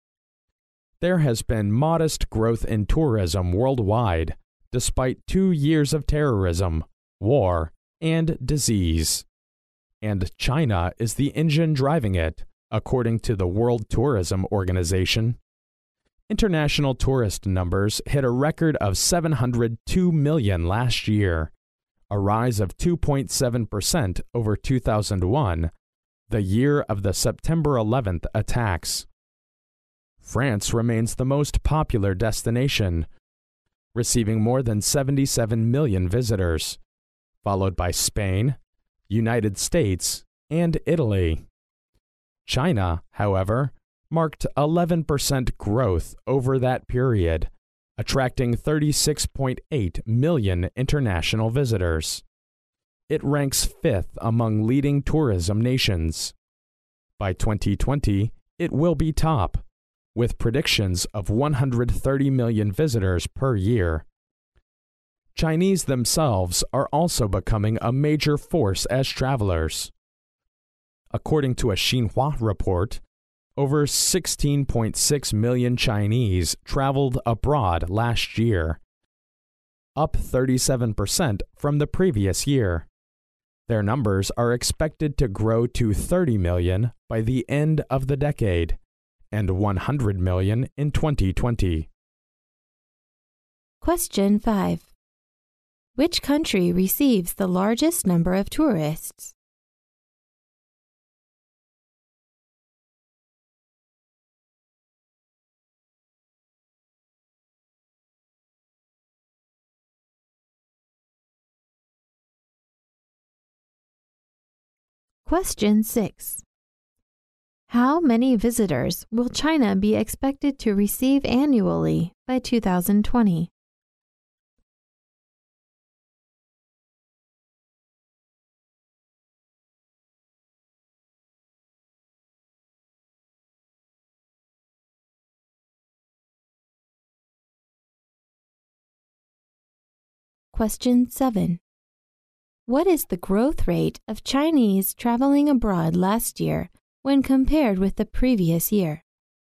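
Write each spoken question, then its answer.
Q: Which country receives the largest number of tourists?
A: France

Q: How many visitors will China be expected to receive annually by 2020?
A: 130 million

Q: What is the growth rate of Chinese traveling abroad last year when compared with the previous year?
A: 37%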